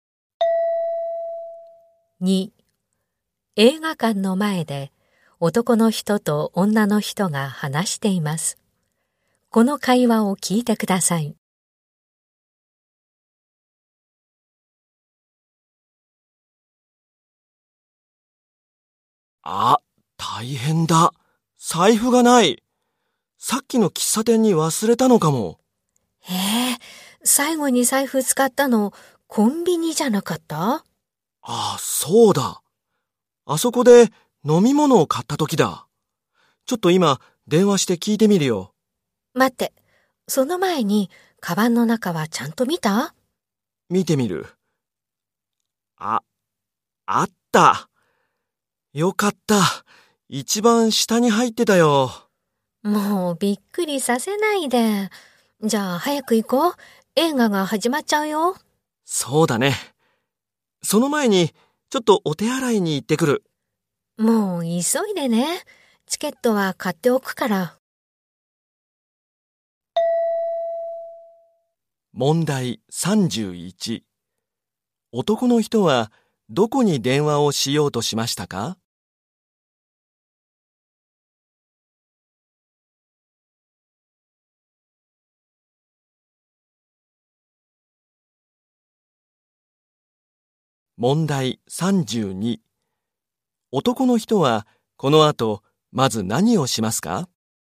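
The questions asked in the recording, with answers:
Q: 男の人はどこに電話をしようとしましたか?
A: コンビニ

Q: 男の人はこの後まず何をしますか?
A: お手洗いに行く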